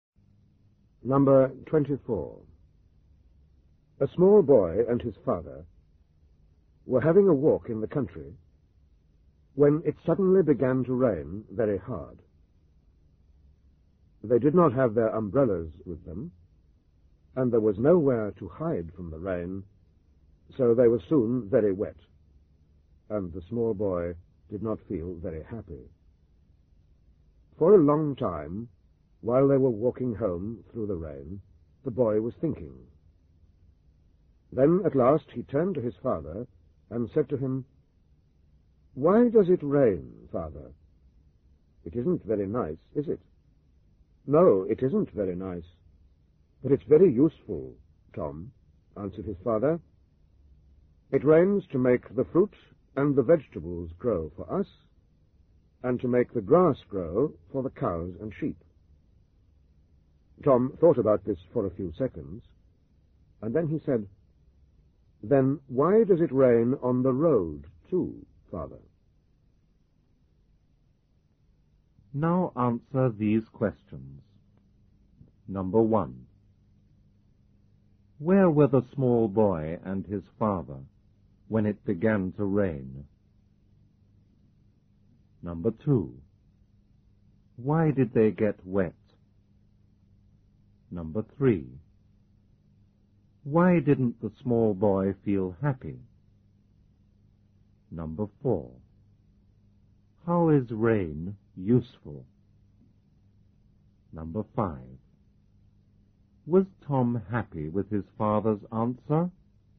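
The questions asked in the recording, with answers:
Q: Where were the small boy and his father when it began to rain?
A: In the country, having a walk

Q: Why did they get wet?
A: They had no umbrellas and nowhere to hide from the rain

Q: Why didn't the small boy feel happy?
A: Because he was very wet

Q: How is rain useful?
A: It makes fruit, vegetables and grass grow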